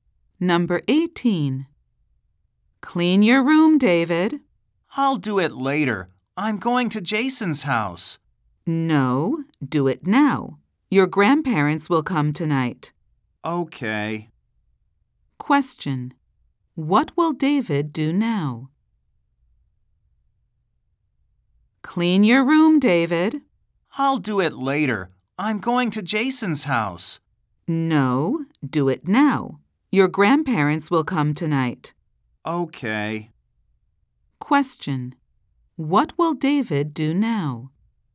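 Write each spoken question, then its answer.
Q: What will David do now?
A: Clean his room.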